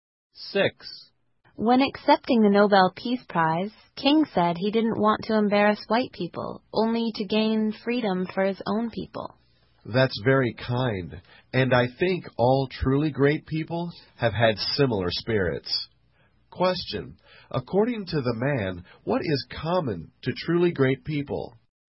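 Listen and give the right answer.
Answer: A kind spirit like King's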